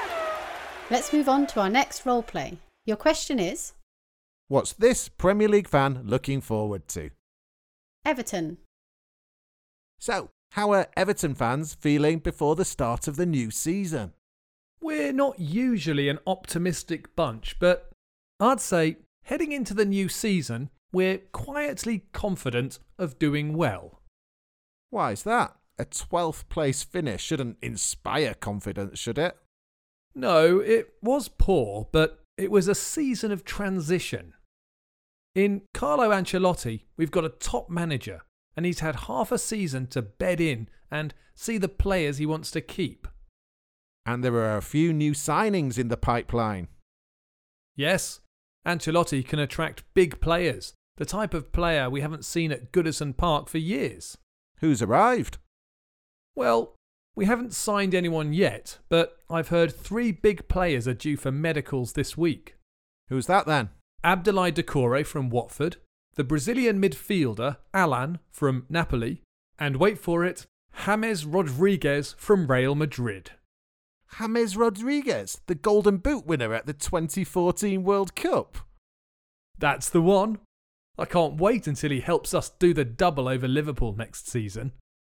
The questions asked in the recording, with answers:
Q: What's this Premier League fan looking forward to?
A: But the thing he's looking forward to most is Everton doing the double over Liverpool.